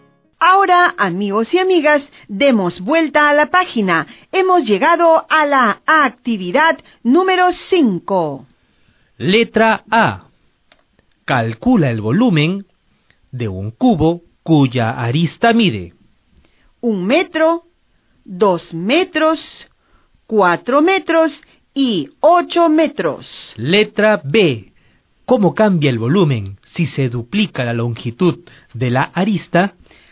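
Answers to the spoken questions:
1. 1 m3, 8 m3, 64 m3 y 512 m3
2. Se multiplica por 8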